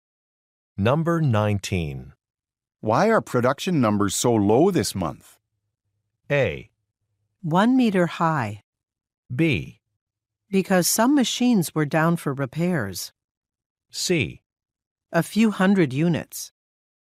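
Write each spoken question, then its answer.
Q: Why are production numbers so low this month?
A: B: Because some machines were down for repairs.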